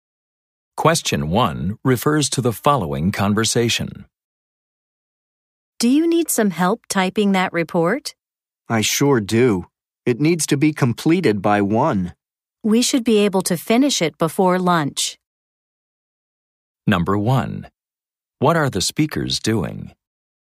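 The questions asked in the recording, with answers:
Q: What are the speakers doing?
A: Typing a report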